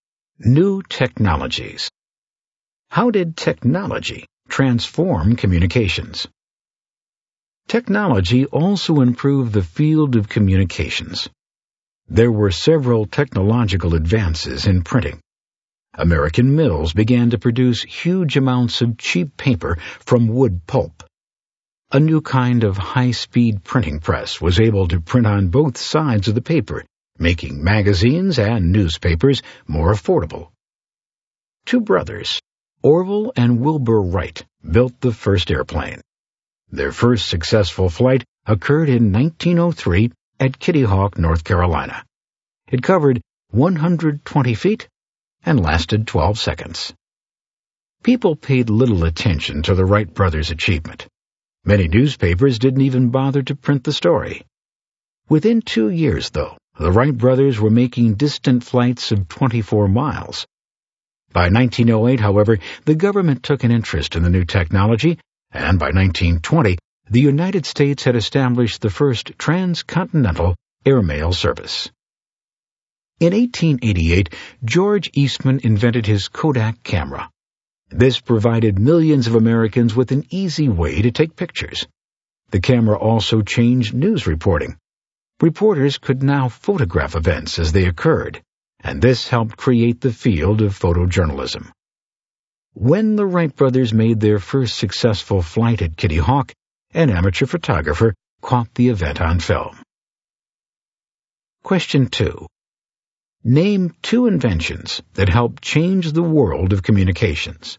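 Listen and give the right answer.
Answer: The high-speed printing press and the Kodak camera (also the airplane)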